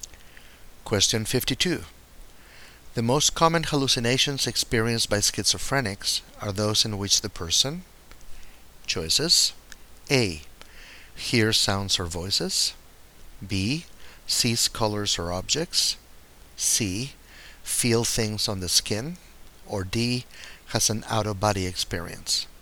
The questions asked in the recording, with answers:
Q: The most common hallucinations experienced by schizophrenics are those in which the person...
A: And the correct choice is A.